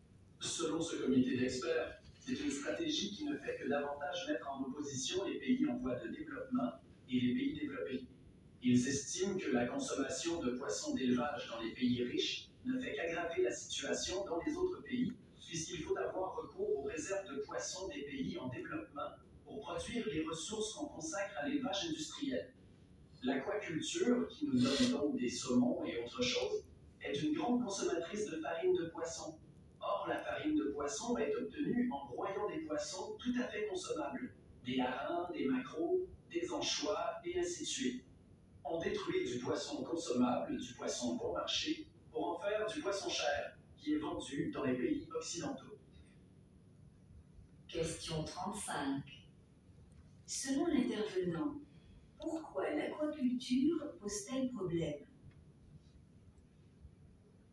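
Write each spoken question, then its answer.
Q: Selon l'intervenant, pourquoi l'aquaculture pose-t-elle problème ?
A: Elle détruit du poisson consommable et bon marché des pays en développement, broyé en farine, pour produire du poisson cher vendu dans les pays riches.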